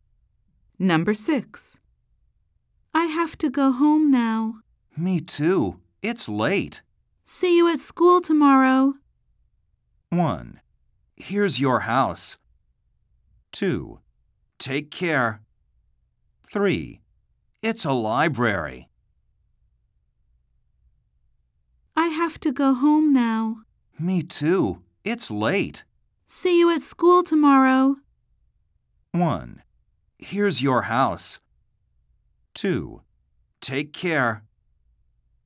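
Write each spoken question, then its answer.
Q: See you at school tomorrow.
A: 2: Take care.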